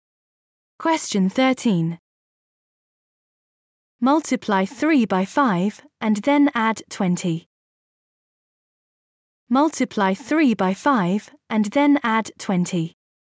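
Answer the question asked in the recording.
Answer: 35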